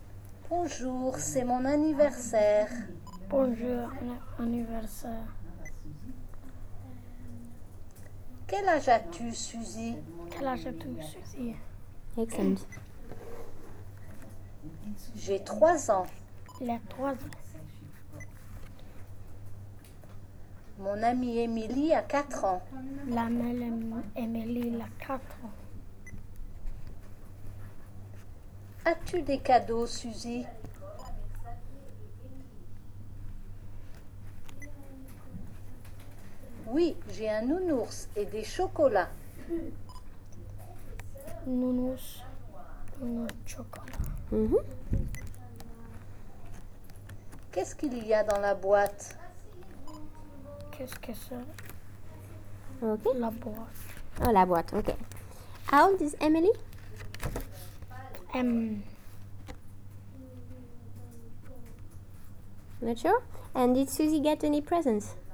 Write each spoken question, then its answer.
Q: And did Suzy get any presents?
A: Yeah.